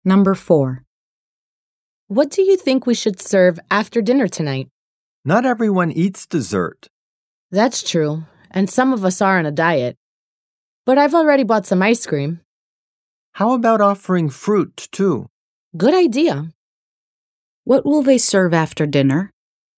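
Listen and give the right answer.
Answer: Ice cream and fruit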